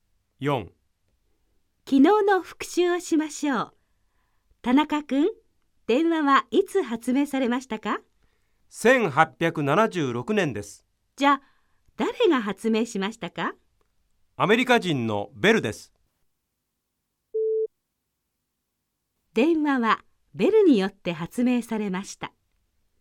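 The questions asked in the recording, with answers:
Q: 電話はベルによって発明されました。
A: 正しい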